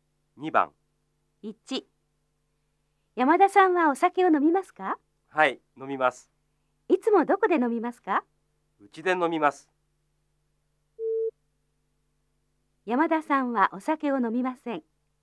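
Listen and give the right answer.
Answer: ×(山田さんはうちでお酒を飲みます)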